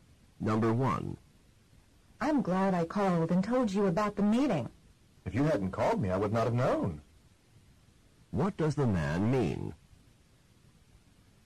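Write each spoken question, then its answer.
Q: What does the man mean?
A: He knew about the meeting because she called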